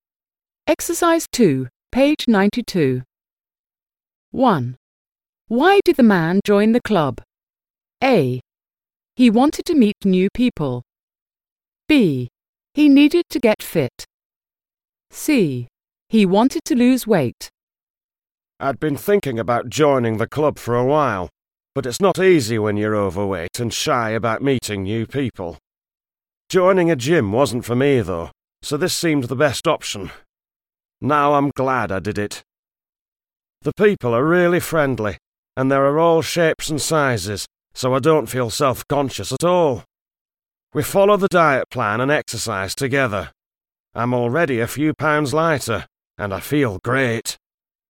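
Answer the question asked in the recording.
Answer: C: He wanted to lose weight.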